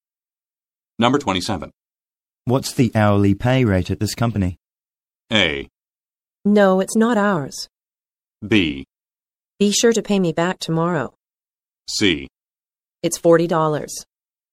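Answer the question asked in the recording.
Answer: C: It's $40.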